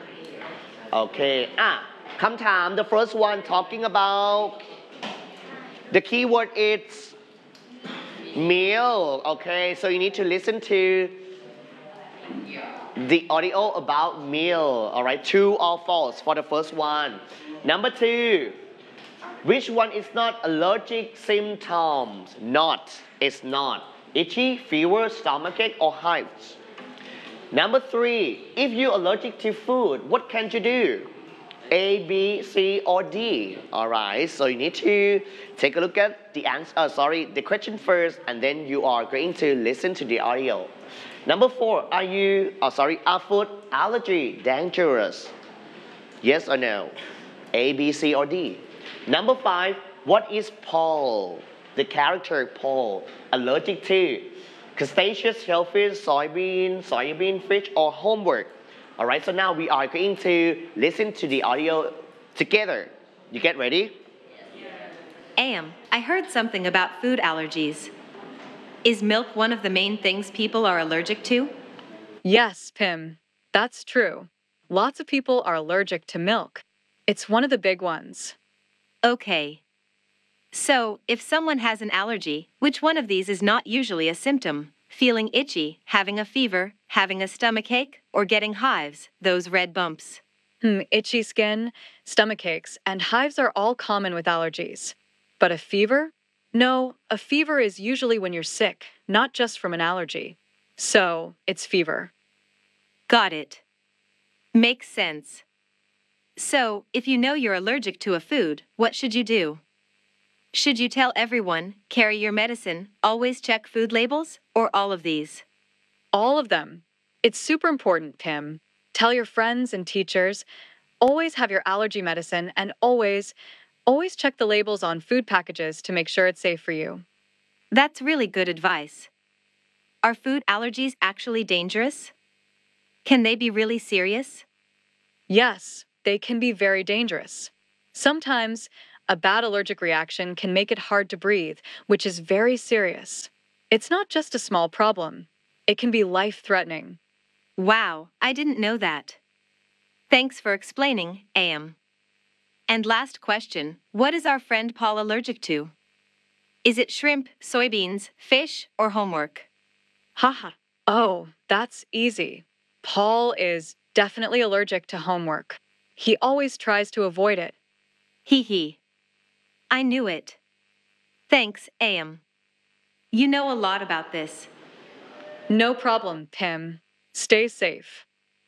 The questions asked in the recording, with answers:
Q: Which one is not allergic symptoms?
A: Fever. Yeah, very good.

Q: If you're allergic to food, what can you do?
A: Or D, all of them are correct.

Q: Are food allergy dangerous?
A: Yes.

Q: what is Paul, the character Paul, allergic to?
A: Homework.